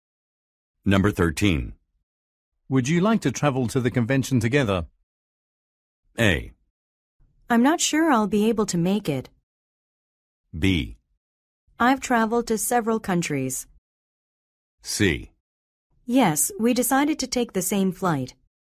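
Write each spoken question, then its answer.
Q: Would you like to travel to the convention together?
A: A: I'm not sure I'll be able to make it.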